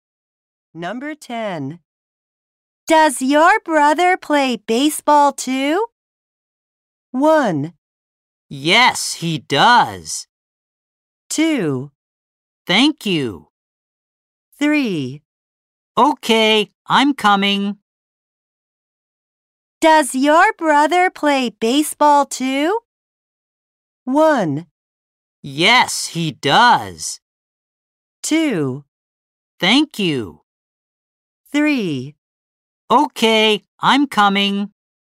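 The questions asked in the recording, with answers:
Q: Does your brother play baseball too?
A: 1: Yes, he does.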